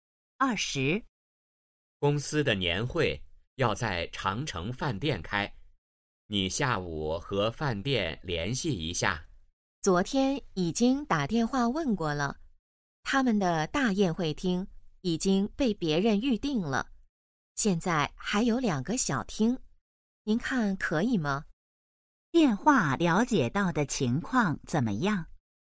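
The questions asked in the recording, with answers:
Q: 电话了解到的情况怎么样?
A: 大宴会厅已被预订,只剩两个小厅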